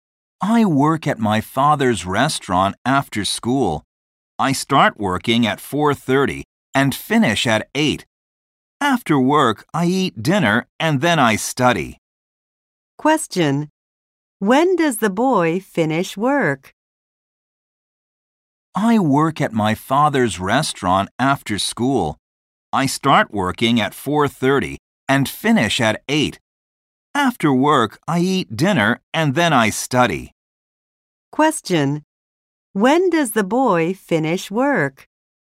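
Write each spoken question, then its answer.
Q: When does the boy finish work?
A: At 8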